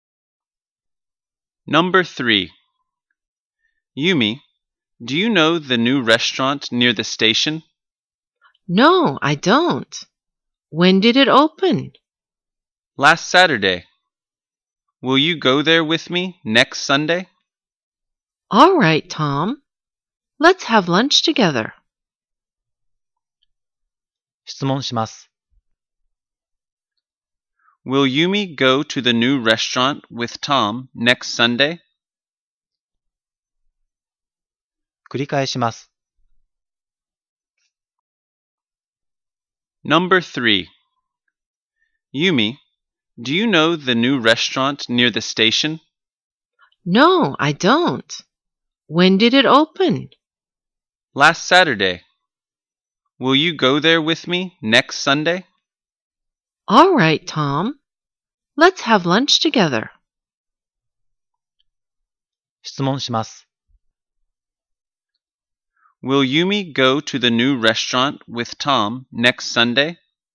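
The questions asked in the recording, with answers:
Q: Will Yumi go to the new restaurant with Tom next Sunday?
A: Yes, she will.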